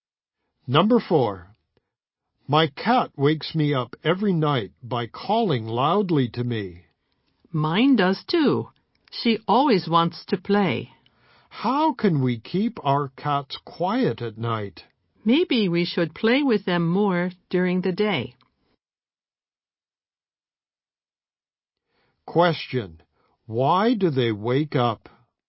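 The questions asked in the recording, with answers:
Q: Question. Why do they wake up?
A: Their cats call loudly to them at night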